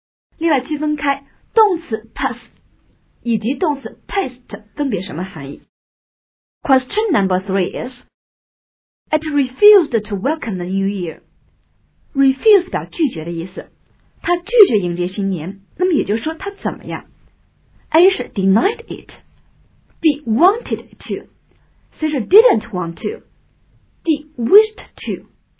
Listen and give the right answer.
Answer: 答案应该是 C, it didn't want to